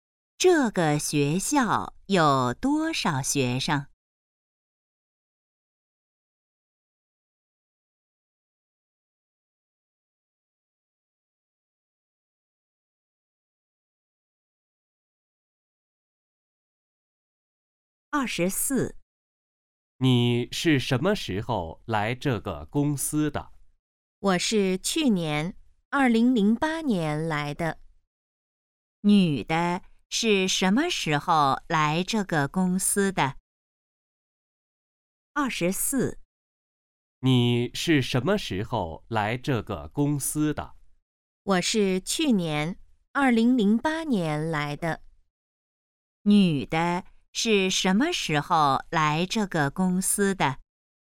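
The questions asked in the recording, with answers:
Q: 女的是什么时候来这个公司的?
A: 2008年(去年)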